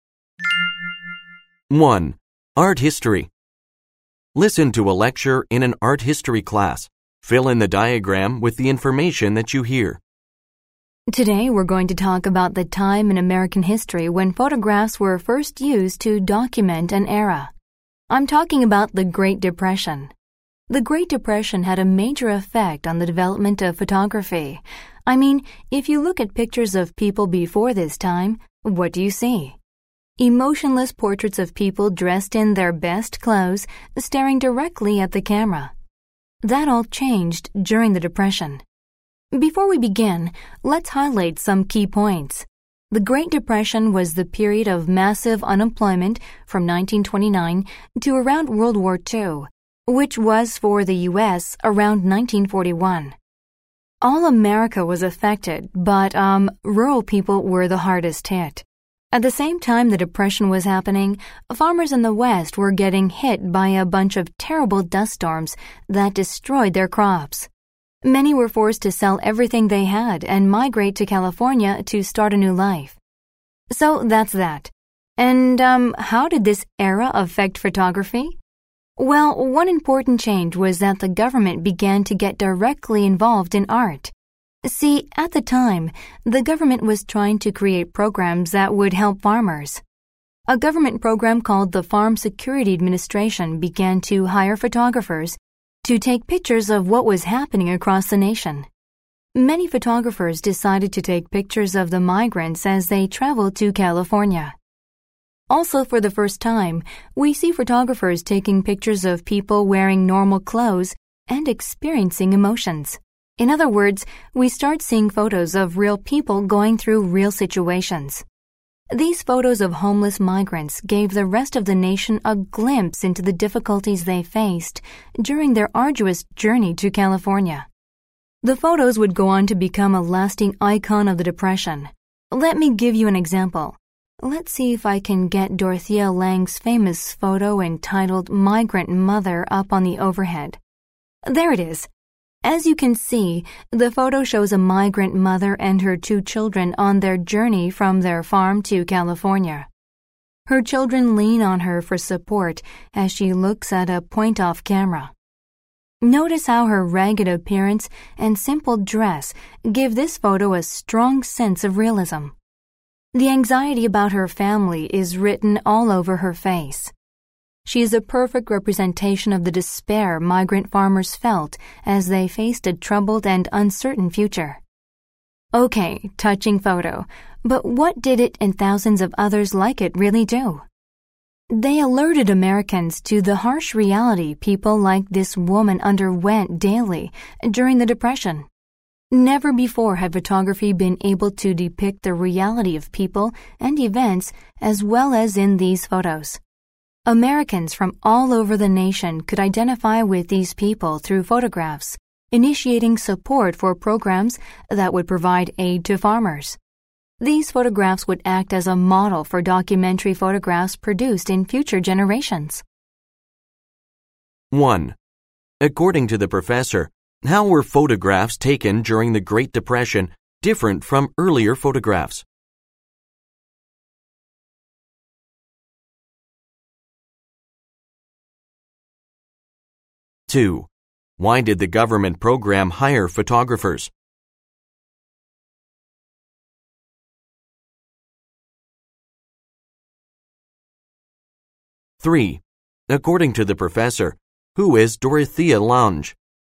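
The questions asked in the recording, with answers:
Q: According to the professor, how were photographs taken during the Great Depression different from earlier photographs?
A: They showed real people in normal clothes experiencing real emotions and situations, not emotionless posed portraits.

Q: Why did the government program hire photographers?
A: To take pictures of what was happening across the nation during the Depression.

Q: According to the professor, who is Dorothea Lange?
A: The photographer who took the famous photo Migrant Mother.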